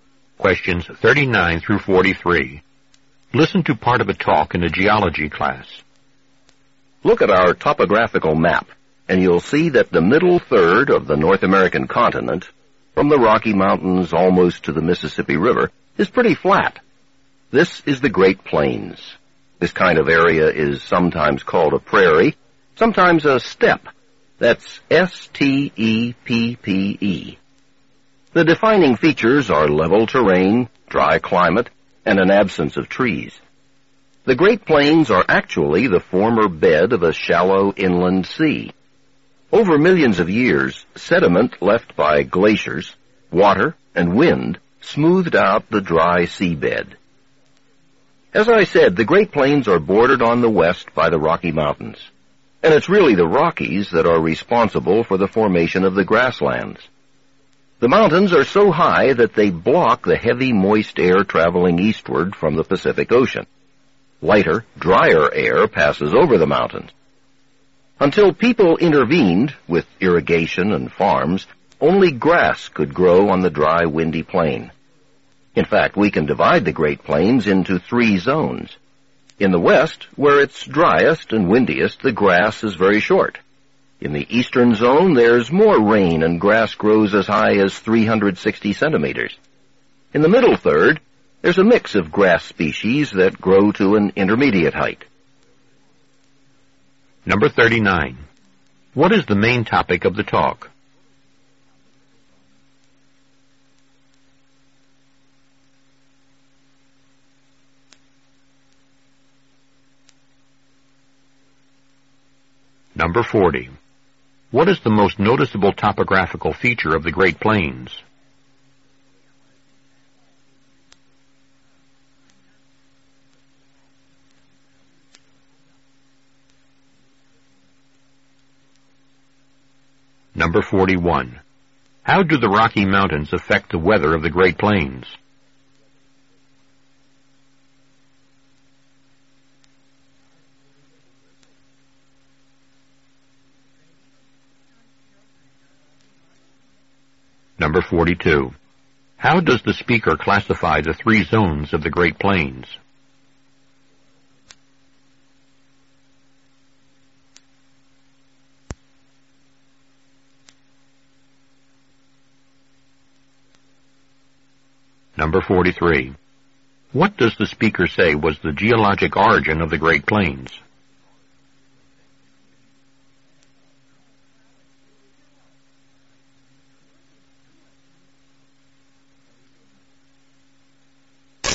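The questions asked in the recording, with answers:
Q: What is the main topic of the talk?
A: The formation and features of the Great Plains

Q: What is the most noticeable topographical feature of the Great Plains?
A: It is flat (level terrain)

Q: How do the Rocky Mountains affect the weather of the Great Plains?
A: They block moist Pacific air, making the plains dry

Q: How does the speaker classify the three zones of the Great Plains?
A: By the height of the grass

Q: What does the speaker say was the geologic origin of the Great Plains?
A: The bed of a former shallow inland sea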